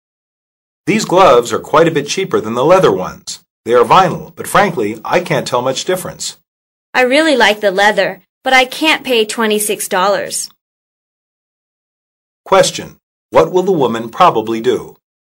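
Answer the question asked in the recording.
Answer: Buy the vinyl gloves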